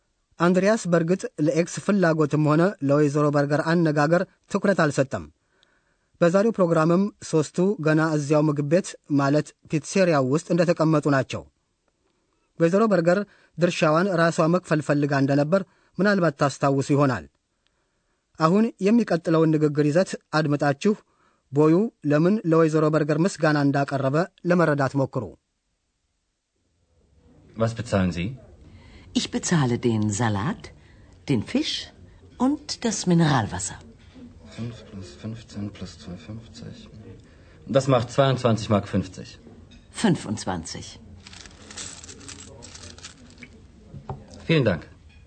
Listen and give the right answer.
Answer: ቦዩ ወይዘሮ በርገር ለሰጠችው ጉርሻ ያመሰግናል።